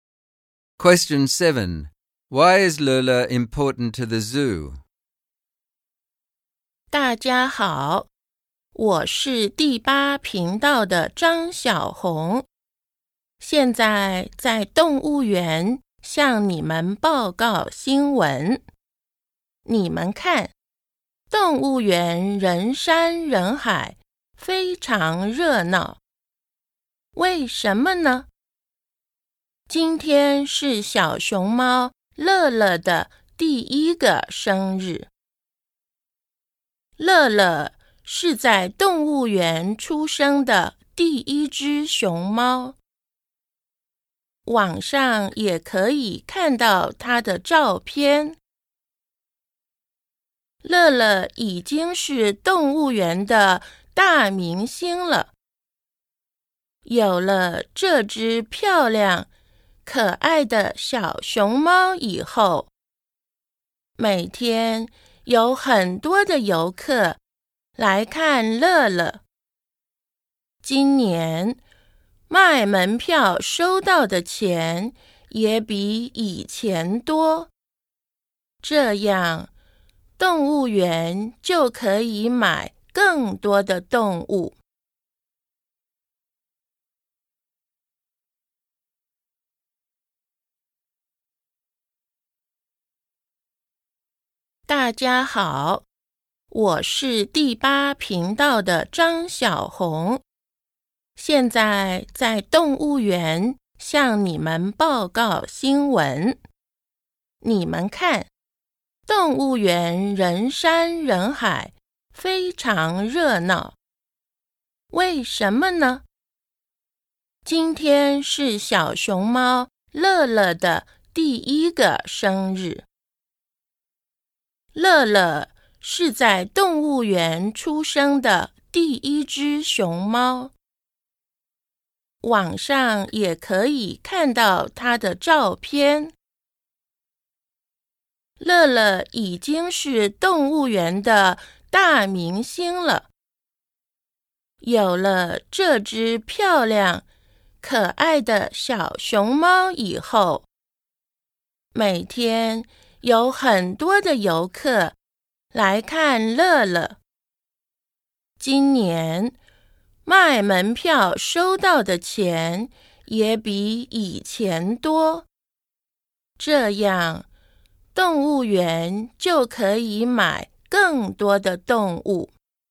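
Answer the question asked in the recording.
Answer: She is the first panda born at the zoo and its star. She attracts many visitors, which raises ticket income so the zoo can buy more animals.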